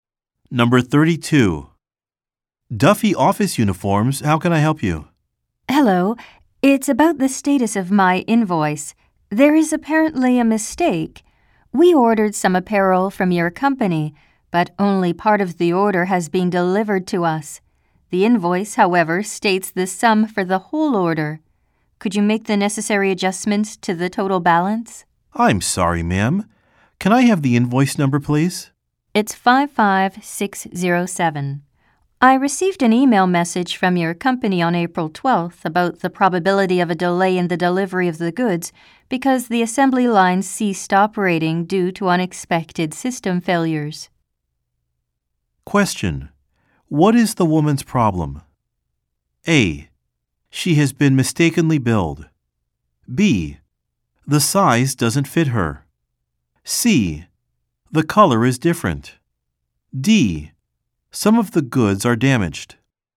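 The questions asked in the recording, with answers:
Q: What is the woman's problem?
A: A: She has been mistakenly billed.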